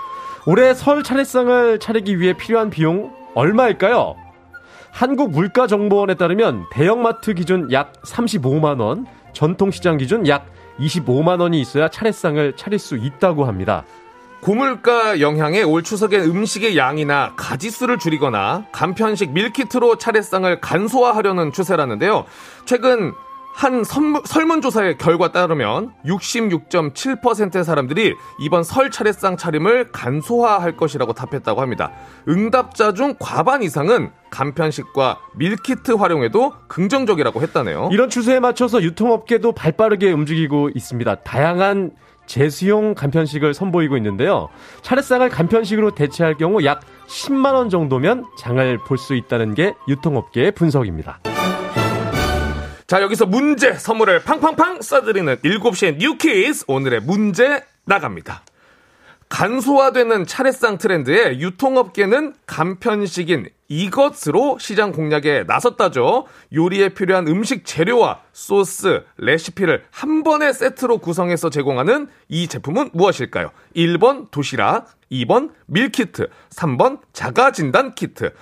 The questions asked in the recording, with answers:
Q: 요리에 필요한 음식 재료와 소스, 레시피를 한 번에 세트로 구성해서 제공하는 이 제품은 무엇일까요?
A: 정답은 2번 밀키트죠.